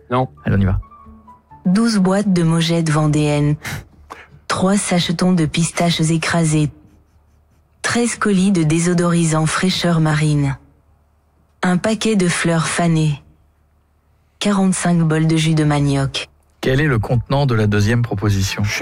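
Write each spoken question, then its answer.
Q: Quel est le contenant de la deuxième proposition?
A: des sachets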